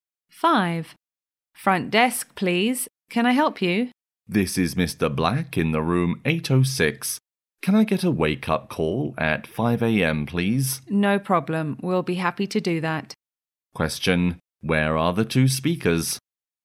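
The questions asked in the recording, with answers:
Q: Where are the two speakers?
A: In a hotel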